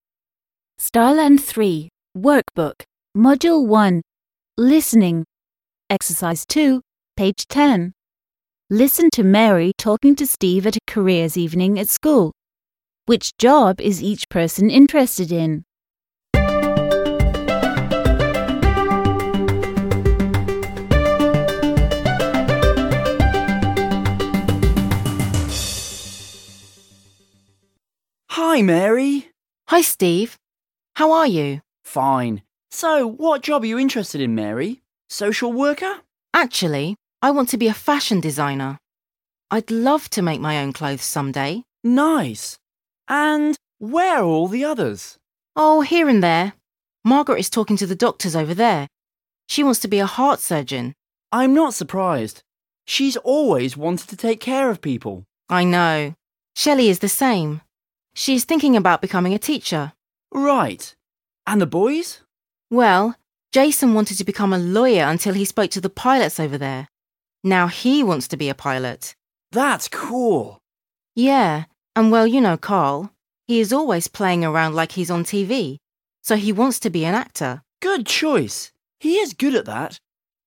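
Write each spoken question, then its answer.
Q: Which job is each person interested in?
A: Mary: fashion designer; Margaret: heart surgeon; Shelley: teacher; Jason: pilot; Carl: actor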